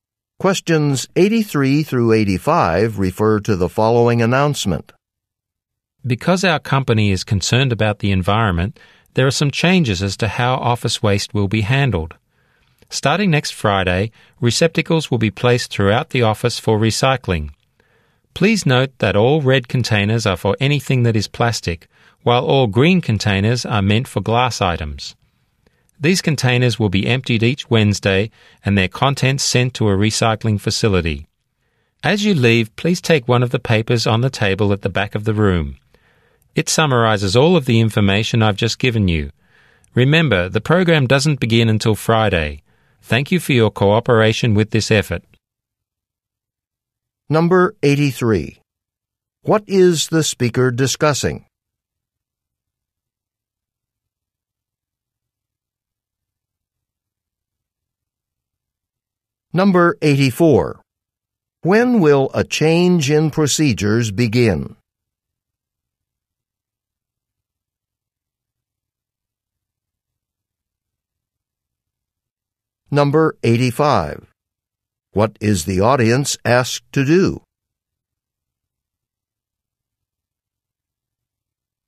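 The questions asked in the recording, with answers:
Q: What is the speaker discussing?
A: A recycling program

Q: When will a change in procedures begin?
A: Next Friday

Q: What is the audience asked to do?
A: Take a paper from the table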